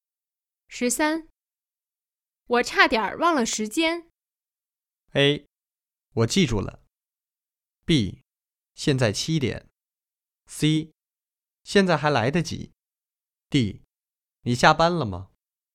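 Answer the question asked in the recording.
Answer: C: 现在还来得及。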